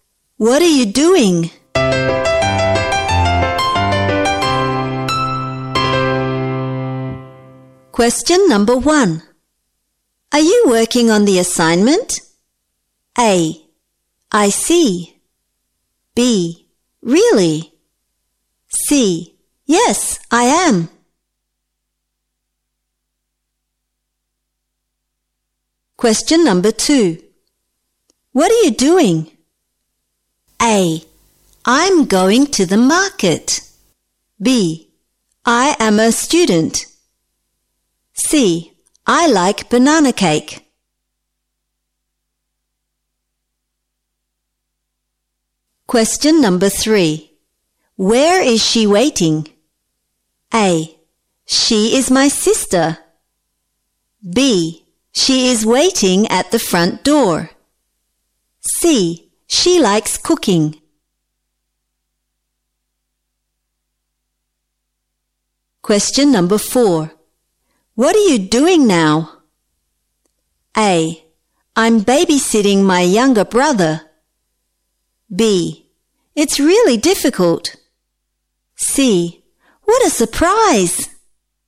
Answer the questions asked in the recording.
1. Jadi, jawaban yang benar untuk soal nomor 1 adalah C.
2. Jadi, jawaban yang benar untuk soal nomor 2 adalah A.
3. Jadi, jawaban yang benar untuk soal nomor 3 adalah B.
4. Jadi, jawaban yang benar untuk soal nomor 4 adalah A.